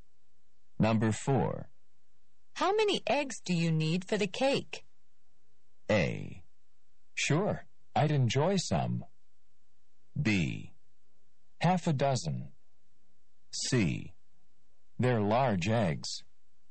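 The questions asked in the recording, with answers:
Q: How many eggs do you need for the cake?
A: B: Half a dozen.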